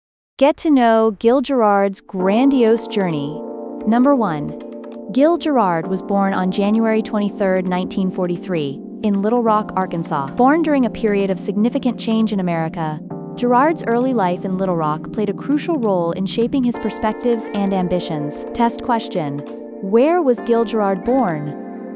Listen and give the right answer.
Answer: Little Rock, Arkansas.